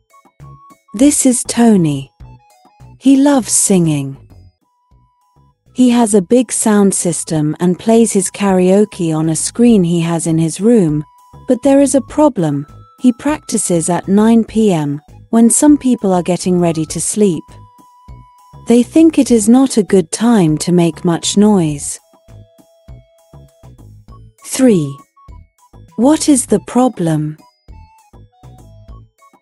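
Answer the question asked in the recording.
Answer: Tony sings loudly at 9 p.m., when people are getting ready to sleep.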